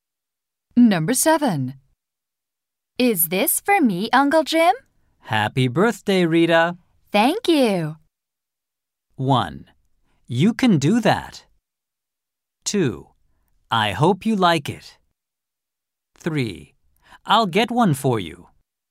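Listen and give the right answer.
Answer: 2: I hope you like it.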